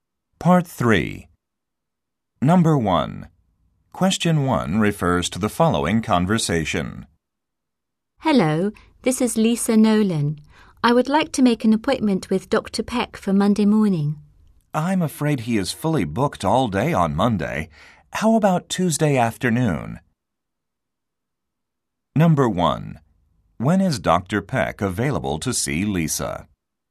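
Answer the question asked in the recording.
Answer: Tuesday afternoon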